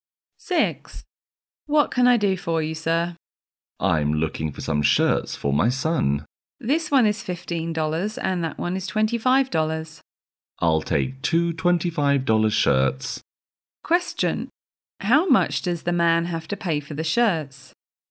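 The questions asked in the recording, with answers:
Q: How much does the man have to pay for the shirts?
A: $50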